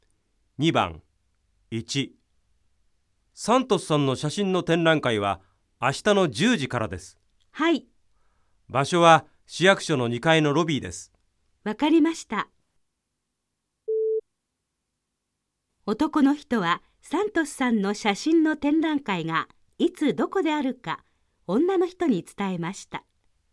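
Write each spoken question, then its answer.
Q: 男の人はサントスさんの写真の展覧会がいつどこであるか女の人に伝えました。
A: ○(正しい)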